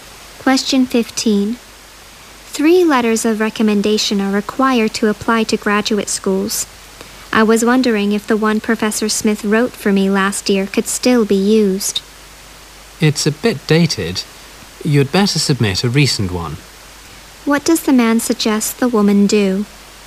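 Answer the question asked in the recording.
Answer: Submit a recent letter of recommendation instead of last year's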